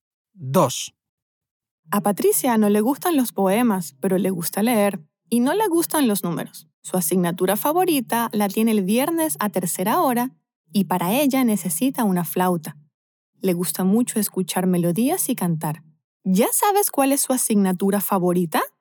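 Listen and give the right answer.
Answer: Música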